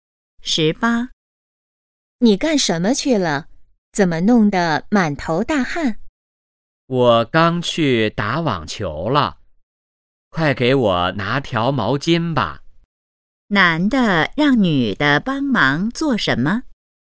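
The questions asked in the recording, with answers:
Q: 男的让女的帮忙做什么?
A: 拿毛巾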